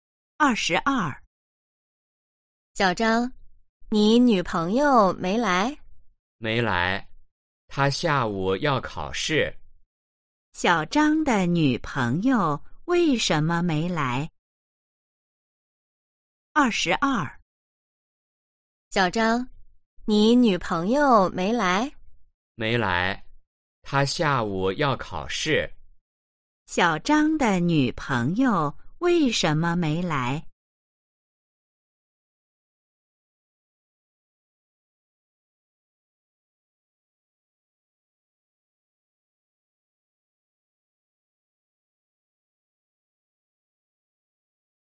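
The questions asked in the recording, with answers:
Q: 小张的女朋友为什么没来?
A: 她下午要考试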